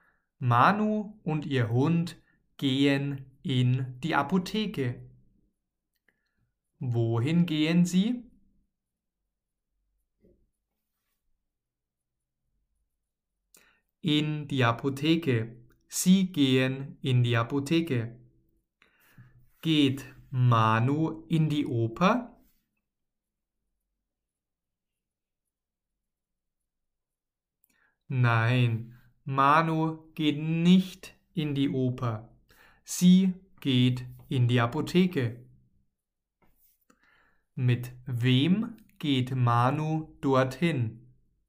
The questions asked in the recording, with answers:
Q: Wohin gehen sie?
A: in die Apotheke. Sie gehen in die Apotheke.

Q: Mit wem geht Manu dorthin?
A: mit ihrem Hund.